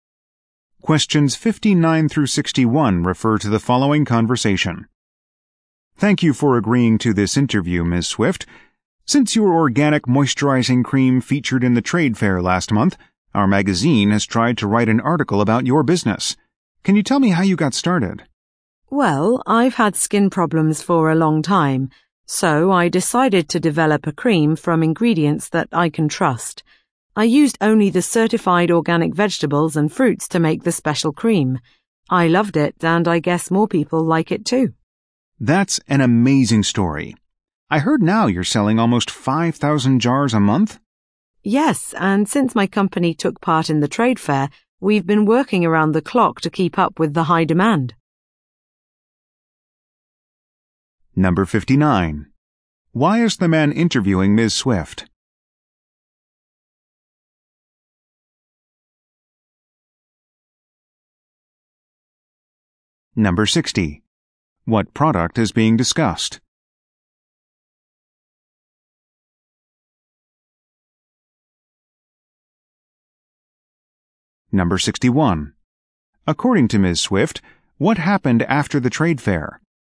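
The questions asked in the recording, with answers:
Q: Why is the man interviewing Ms.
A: To write a magazine article about her business

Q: What product is being discussed?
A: An organic moisturizing cream

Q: According to Ms.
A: Demand rose sharply; they work around the clock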